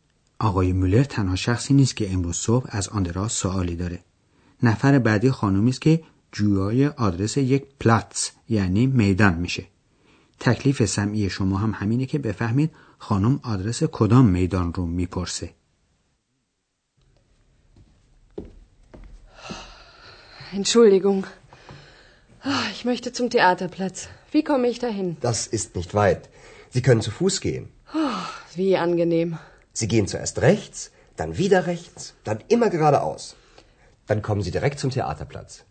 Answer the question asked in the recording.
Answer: پس میدان مورد نظر خانم میدان تئاتر بود.